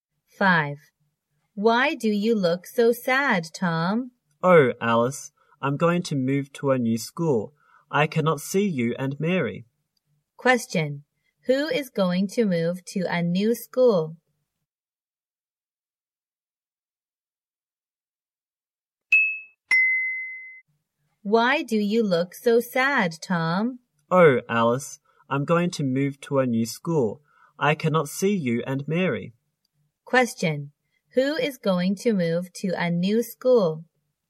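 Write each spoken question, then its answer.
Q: Who is going to move to a new school?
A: Tom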